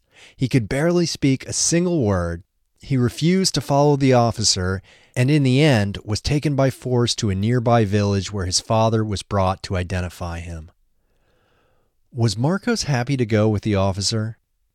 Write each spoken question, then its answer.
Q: Was Marcos happy to go with the officer?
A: No, he refused to follow the officer.